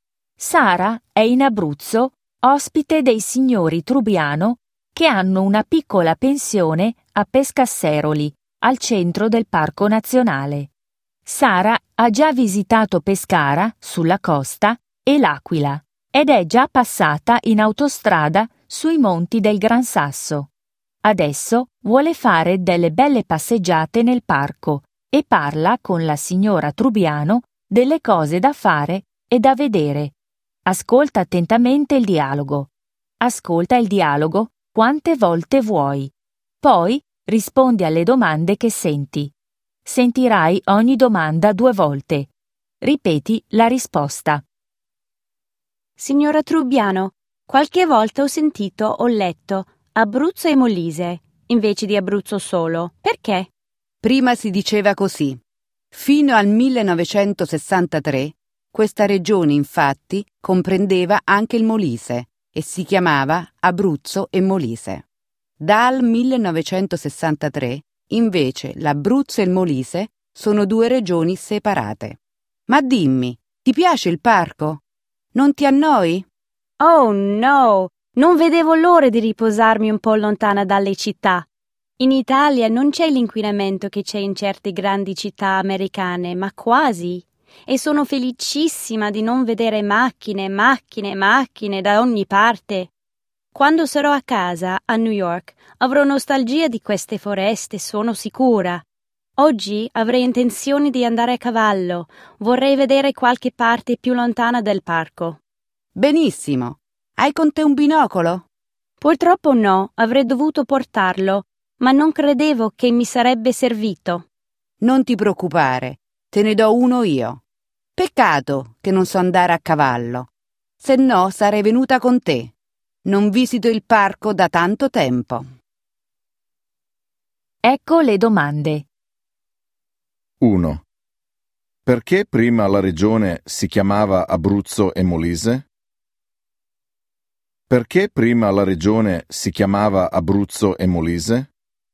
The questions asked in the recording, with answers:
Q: Perché prima la regione si chiamava Abruzzo e Molise?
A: Perché era una sola regione che comprendeva anche il Molise.